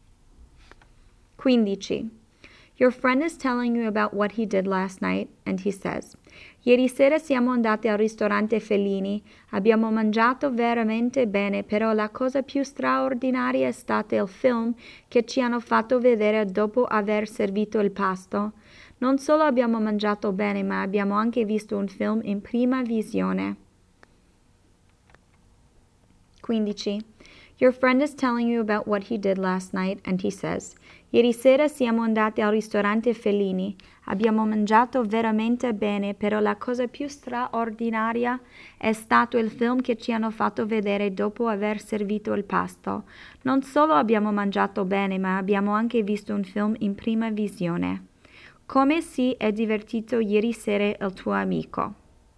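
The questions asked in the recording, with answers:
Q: Come si è divertito ieri sera il tuo amico?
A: Ha mangiato bene al ristorante e ha visto un film in prima visione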